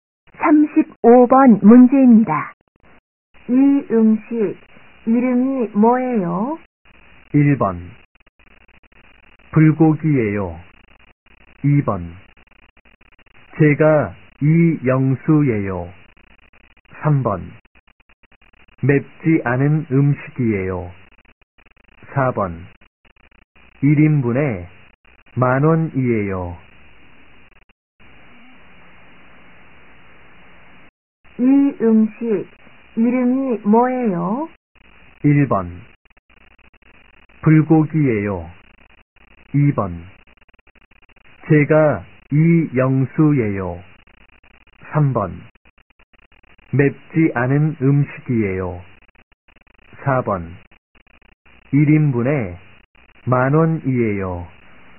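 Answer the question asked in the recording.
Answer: 1: 불고기예요.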